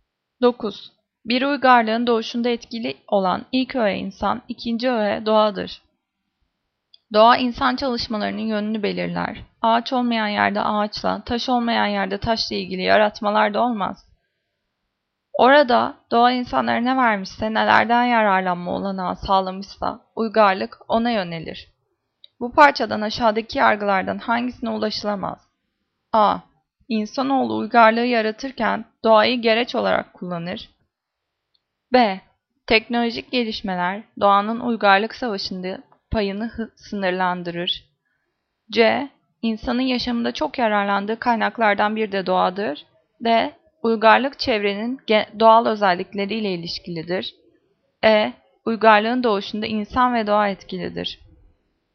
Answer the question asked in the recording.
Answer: Cevap B. Teknolojik gelişmeler doğanın uygarlık savaşındaki payını sınırlandırır.